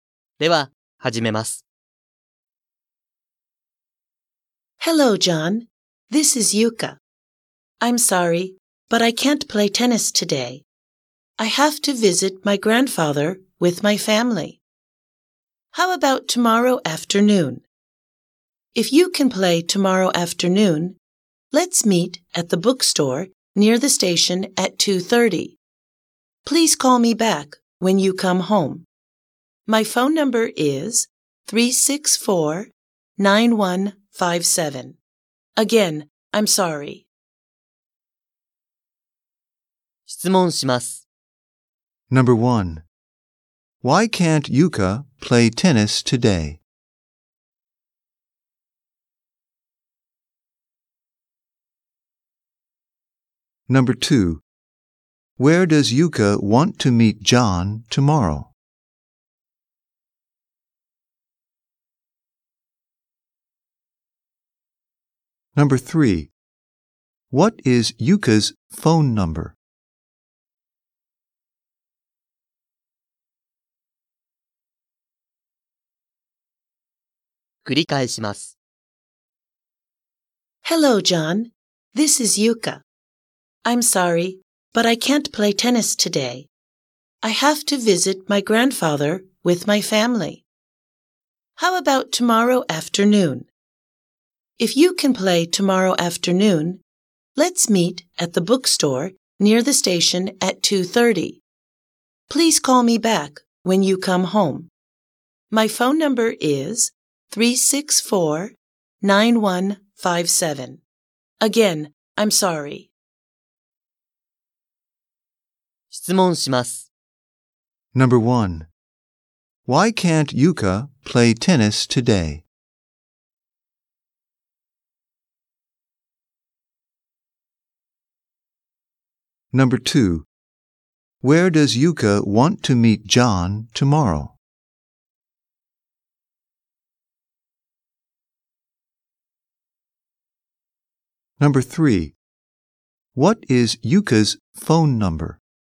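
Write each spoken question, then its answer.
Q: Why can't Yuka play tennis today?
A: She has to visit her grandfather with her family.

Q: Where does Yuka want to meet John tomorrow?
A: At the bookstore near the station

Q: What is Yuka's phone number?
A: 364-9157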